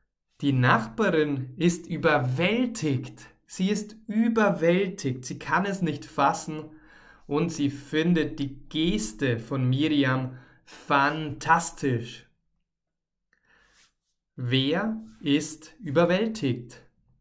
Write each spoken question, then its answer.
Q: Wer ist überwältigt?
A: Die Nachbarin. Genau, die Nachbarin ist überwältigt.